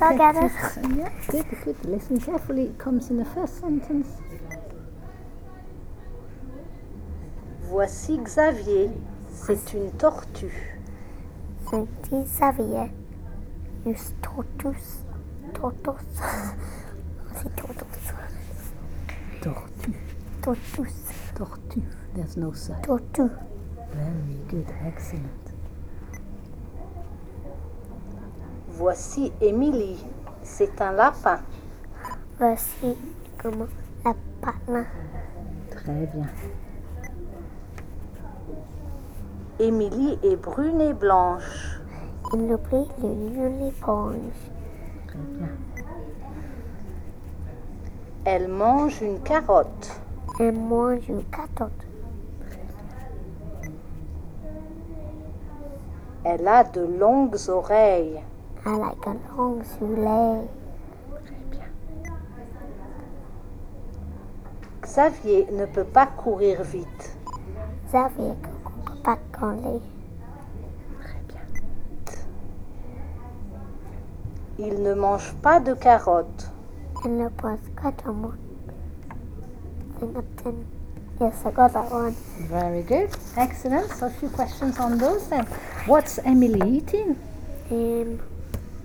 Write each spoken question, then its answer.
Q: What's Emily eating?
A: Carrot.